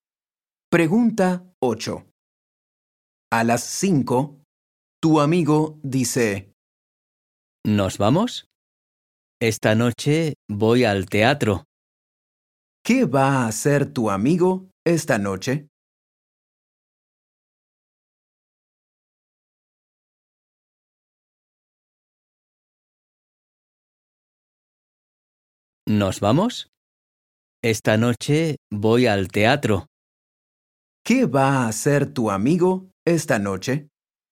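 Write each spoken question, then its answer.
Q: ¿Qué va a hacer tu amigo esta noche?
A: Ir al teatro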